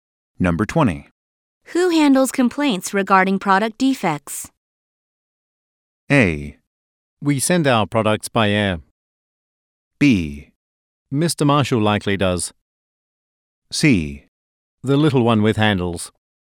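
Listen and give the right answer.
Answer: B: Mr. Marshall likely does.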